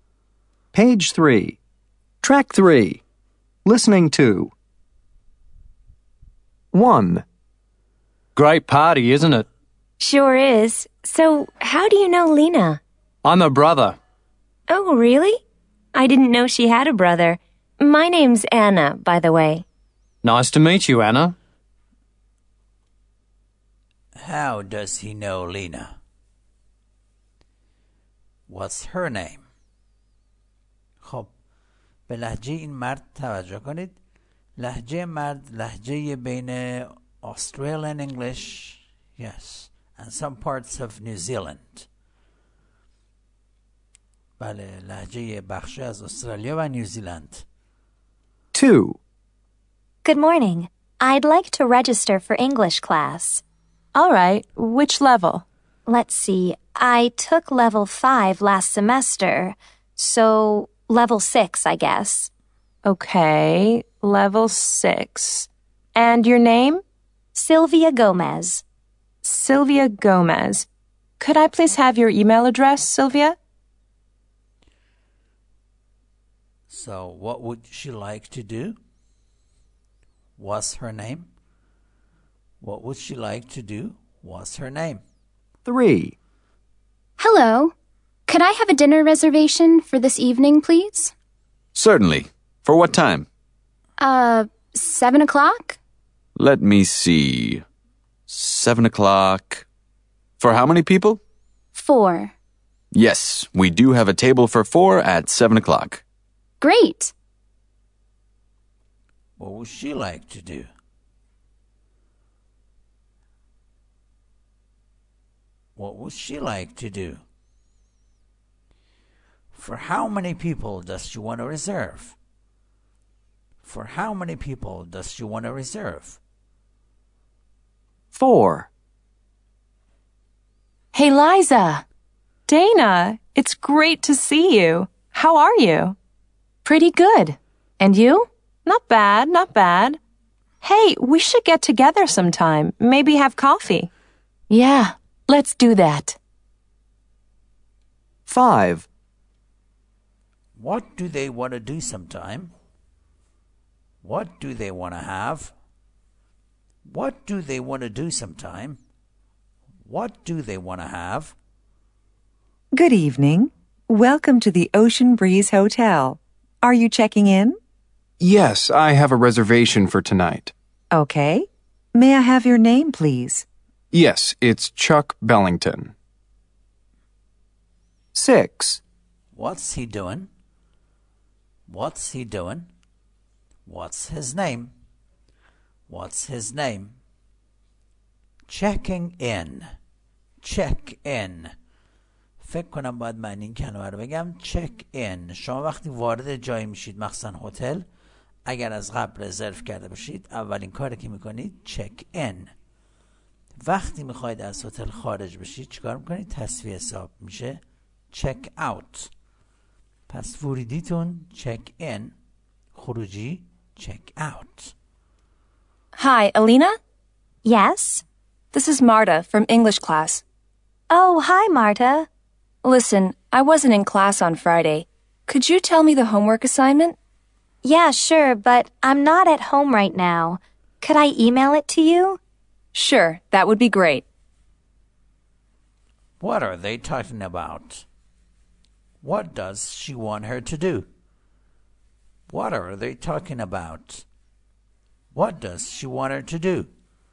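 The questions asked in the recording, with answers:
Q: How does he know Lena?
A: He's her brother

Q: What's her name?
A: Anna

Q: So, what would she like to do?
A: Register for English class (level 6)

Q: What's her name?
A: Sylvia Gomez

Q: What would she like to do?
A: Make a dinner reservation for this evening

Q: What do they want to do sometime?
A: Get together

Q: What do they want to have?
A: Coffee

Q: What's he doing?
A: Checking in at a hotel

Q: What's his name?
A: Chuck Bellington

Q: What are they talking about?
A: The homework assignment

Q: What does she want her to do?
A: Tell her the homework assignment (email it)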